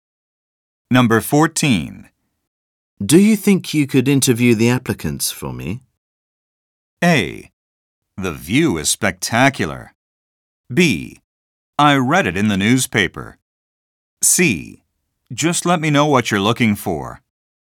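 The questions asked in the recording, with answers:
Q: Do you think you could interview the applicants for me?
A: C: Just let me know what you're looking for.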